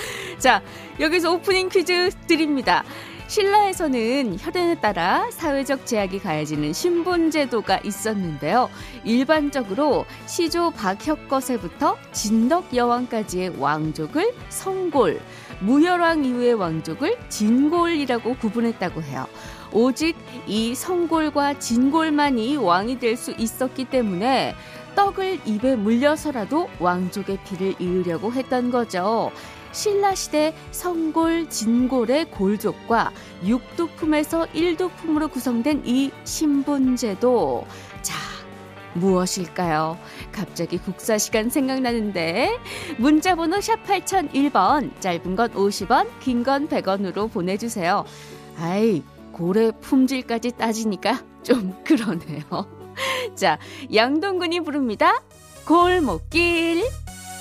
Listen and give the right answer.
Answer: 골품제요.